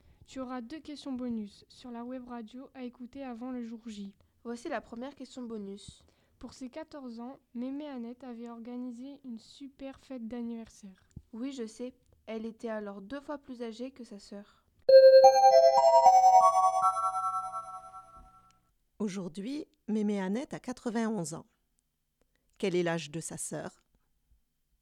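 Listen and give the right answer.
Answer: 84 ans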